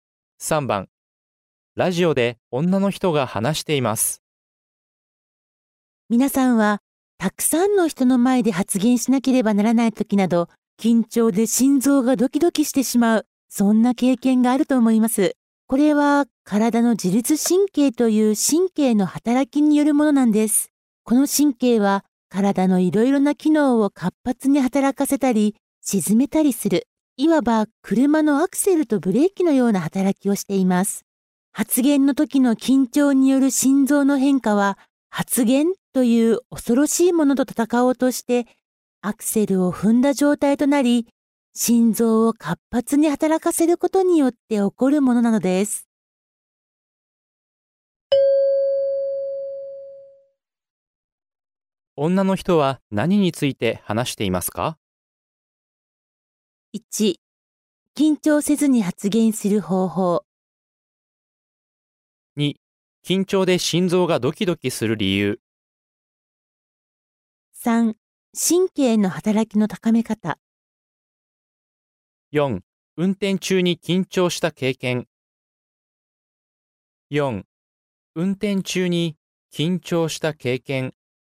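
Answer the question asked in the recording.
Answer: 2: 緊張で心臓がドキドキする理由。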